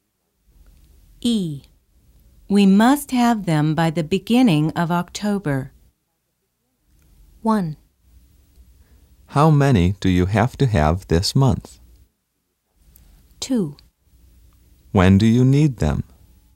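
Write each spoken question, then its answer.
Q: We must have them by the beginning of October.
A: 2: When do you need them?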